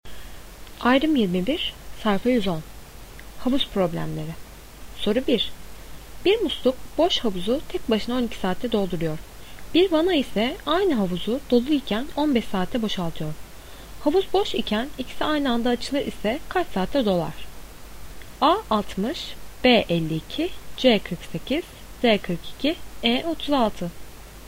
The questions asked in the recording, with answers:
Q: Havuz boş iken ikisi aynı anda açılır ise kaç saatte dolar?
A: Doğru cevap A 60.